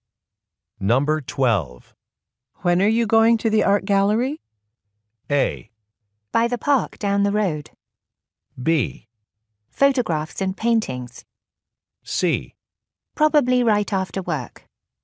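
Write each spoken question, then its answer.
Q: When are you going to the art gallery?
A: C: Probably right after work.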